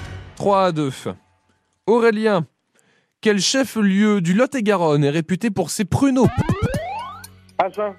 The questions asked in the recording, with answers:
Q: Aurélien, quel chef-lieu du Lot-et-Garonne est réputé pour ses pruneaux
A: Agen, oui, trois partout.